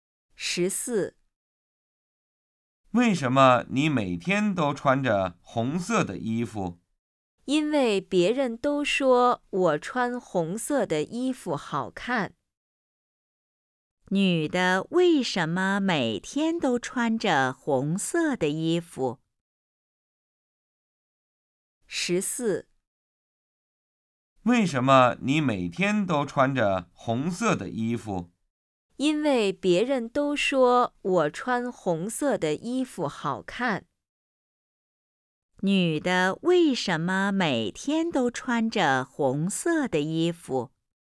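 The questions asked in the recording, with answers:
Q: 女的为什么每天都穿着红色的衣服?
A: 因为别人都说她穿红色的衣服好看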